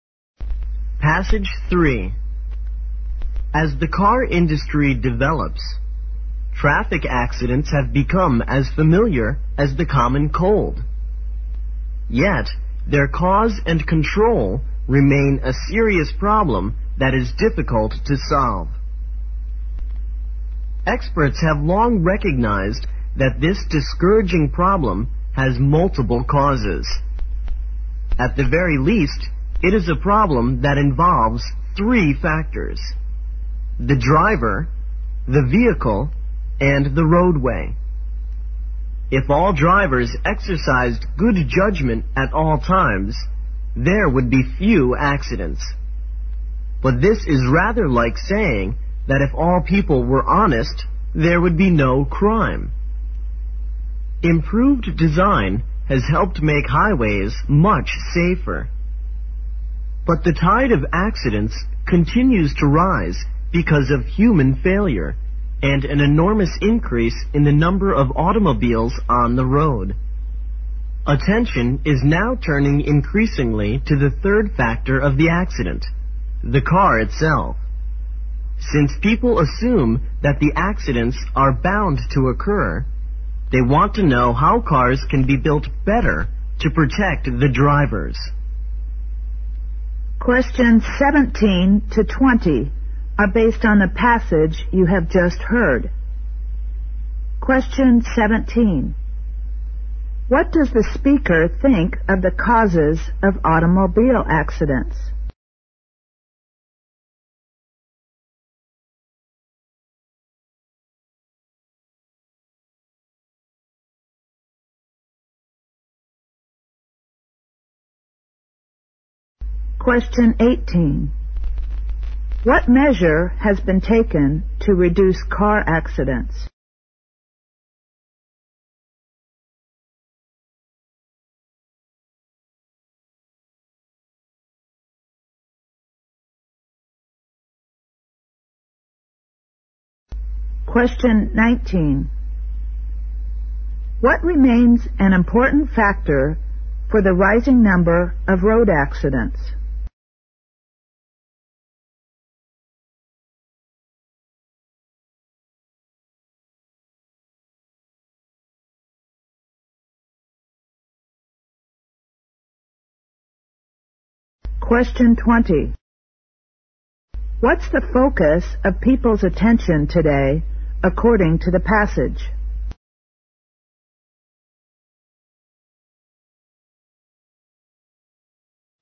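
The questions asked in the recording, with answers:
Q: What does the speaker think of the causes of automobile accidents?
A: They have multiple causes: the driver, the vehicle and the roadway

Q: What measure has been taken to reduce car accidents?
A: Improved highway design

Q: What remains an important factor for the rising number of road accidents?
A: Human failure, along with a huge increase in the number of cars

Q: What's the focus of people's attention today, according to the passage?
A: The car itself: how cars can be built better to protect drivers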